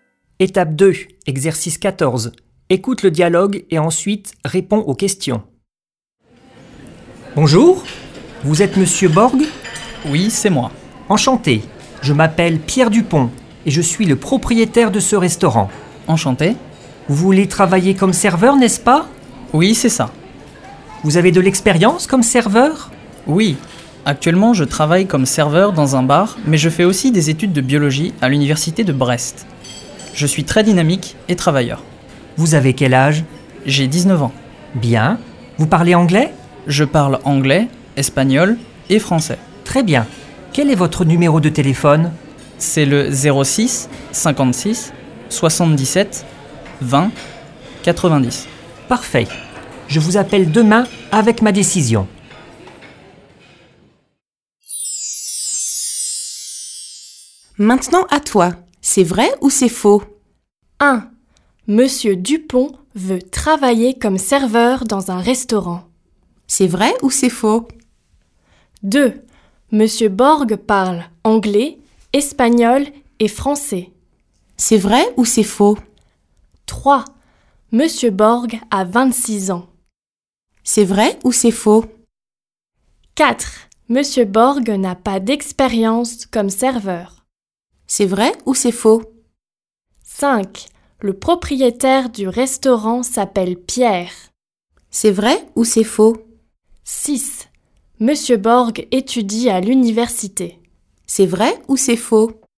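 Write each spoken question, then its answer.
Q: Monsieur Dupont veut travailler comme serveur dans un restaurant.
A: Faux

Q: Monsieur Borg parle anglais, espagnol et français.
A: Vrai

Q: Monsieur Borg a 26 ans.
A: Faux

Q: Monsieur Borg n'a pas d'expérience comme serveur.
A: Faux

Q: Le propriétaire du restaurant s'appelle Pierre.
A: Vrai

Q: Monsieur Borg étudie à l'université.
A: Vrai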